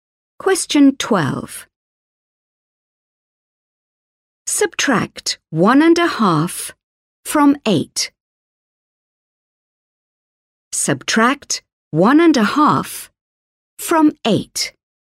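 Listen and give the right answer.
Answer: 6.5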